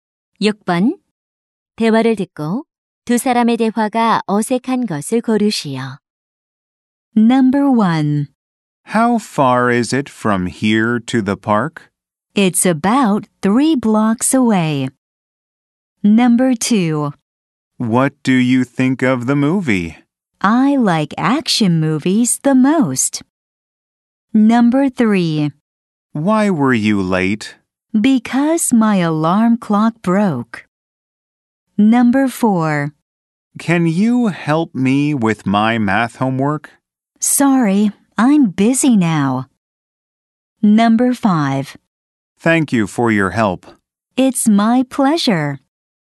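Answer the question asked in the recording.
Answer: 2: What do you think of the movie? / I like action movies the most.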